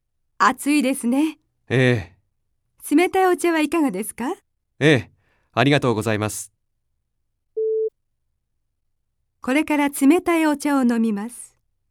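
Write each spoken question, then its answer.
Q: これから冷たいお茶を飲みます。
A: ○(正しい)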